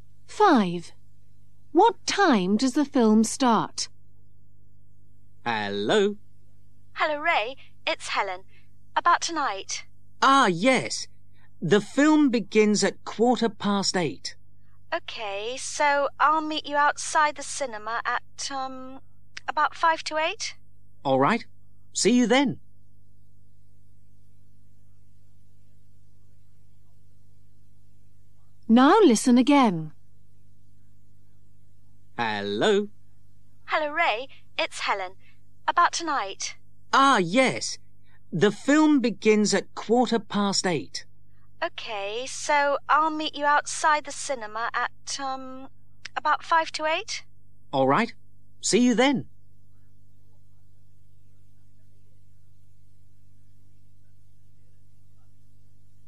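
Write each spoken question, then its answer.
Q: What time does the film start?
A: 8:15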